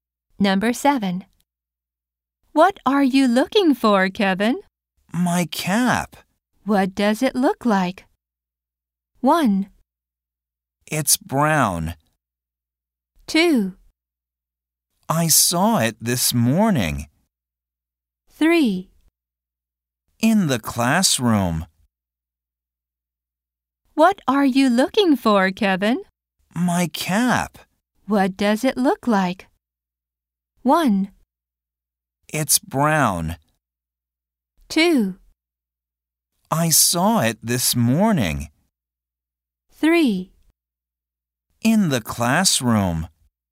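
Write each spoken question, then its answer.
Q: What does it look like?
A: 1: It's brown.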